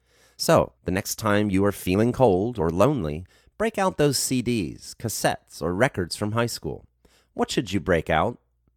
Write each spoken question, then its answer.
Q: What should you break out?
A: You should break out those CDs, cassettes, or records from high school.